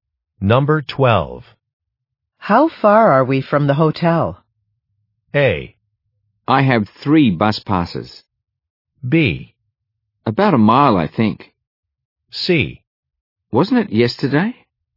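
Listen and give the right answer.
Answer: B: About a mile, I think.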